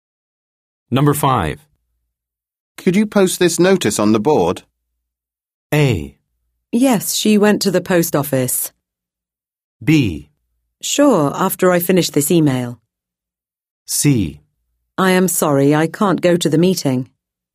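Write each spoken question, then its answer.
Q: Could you post this notice on the board?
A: B: Sure, after I finish this email.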